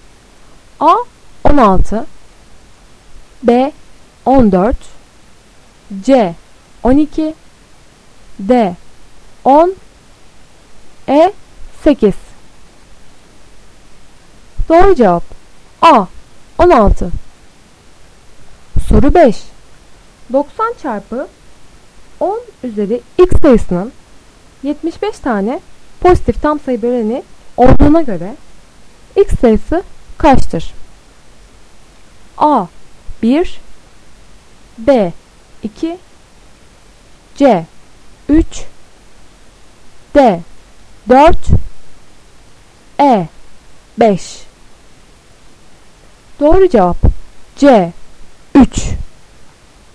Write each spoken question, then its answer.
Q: 90 çarpı 10 üzeri x sayısının 75 tane pozitif tam sayı böleni olduğuna göre x sayısı kaçtır?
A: Doğru cevap C 3